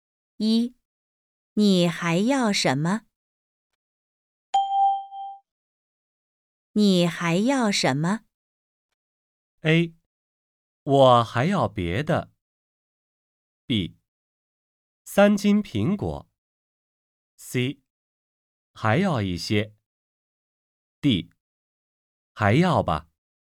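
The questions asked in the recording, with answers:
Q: 你还要什么?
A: B: 三斤苹果。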